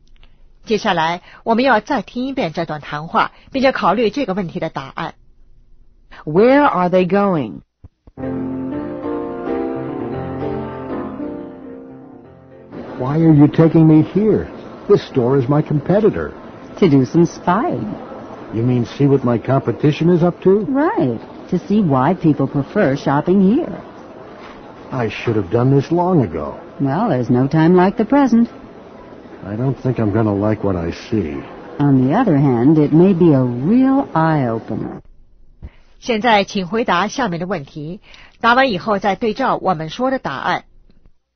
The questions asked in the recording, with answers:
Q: Where are they going?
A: To the competition.